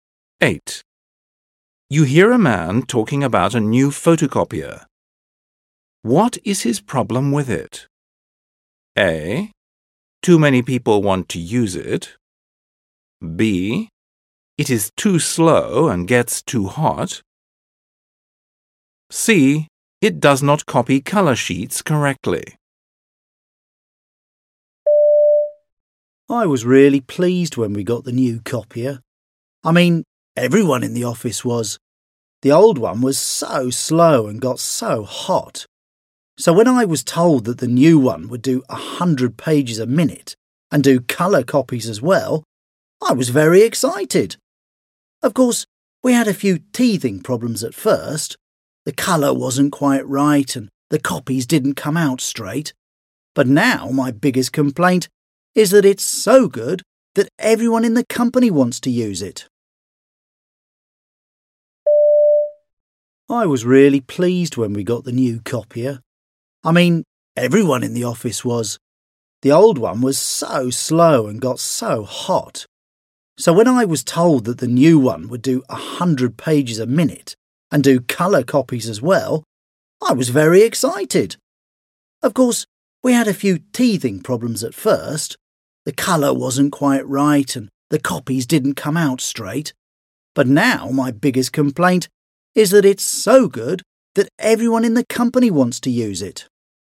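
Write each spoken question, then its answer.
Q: What is his problem with it?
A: A: Too many people want to use it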